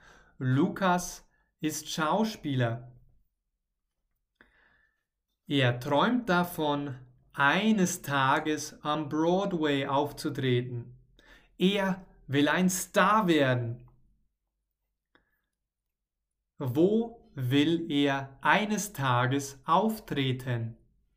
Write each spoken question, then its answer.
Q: Wo will er eines Tages auftreten?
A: Am Broadway, genau. Er will eines Tages in den USA am Broadway auftreten.